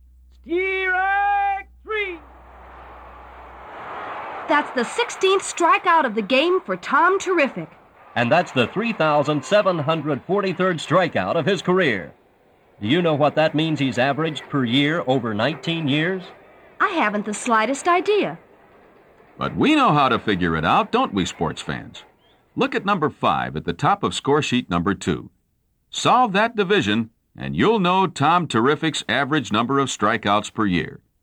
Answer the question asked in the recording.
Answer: Then you should have discovered that Tom averaged 197 strikeouts per year over his pitching career.